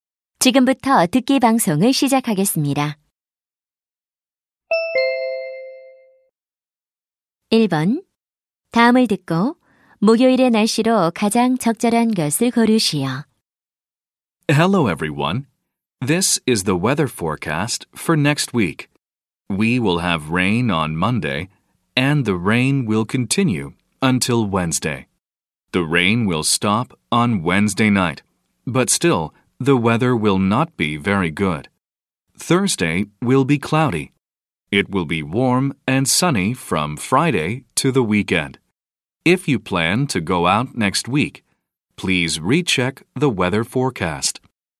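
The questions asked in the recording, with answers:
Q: 다음을 듣고 목요일의 날씨로 가장 적절한 것을 고르시오.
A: 흐림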